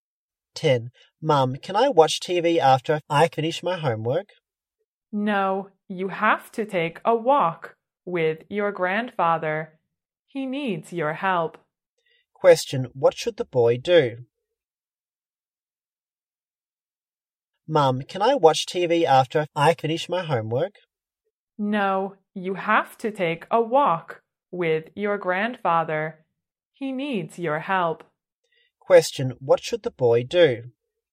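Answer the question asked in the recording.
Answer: Take a walk with his grandfather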